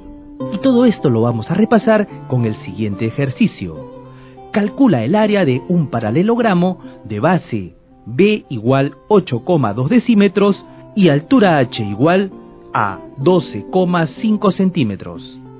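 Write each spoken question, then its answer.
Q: Calcula el área de un paralelogramo de base B igual 8,2 decímetros y altura H igual a 12,5 centímetros.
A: 10,25 decímetros cuadrados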